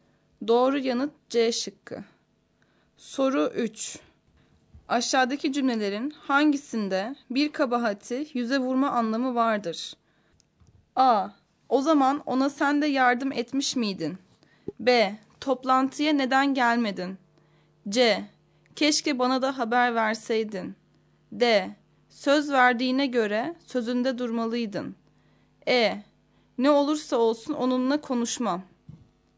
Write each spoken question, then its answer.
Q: Aşağıdaki cümlelerin hangisinde bir kabahati yüze vurma anlamı vardır?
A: Doğru yanıt D şıkkı.